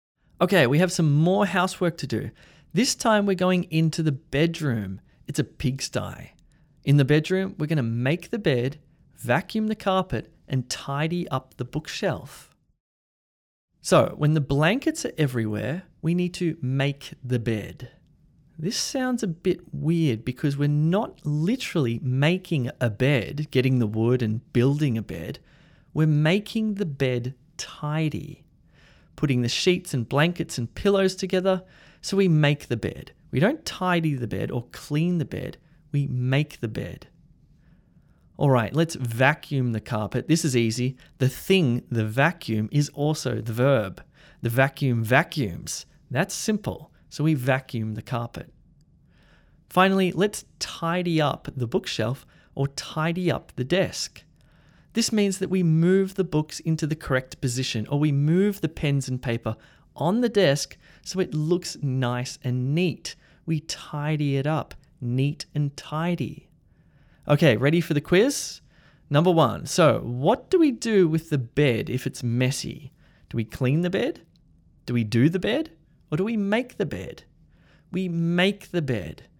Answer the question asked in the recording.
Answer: We make the bed.